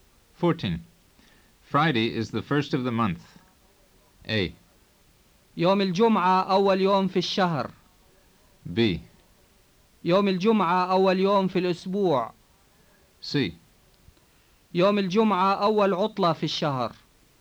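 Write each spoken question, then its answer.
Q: Friday is the first of the month.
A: A: يوم الجمعة أول يوم في الشهر.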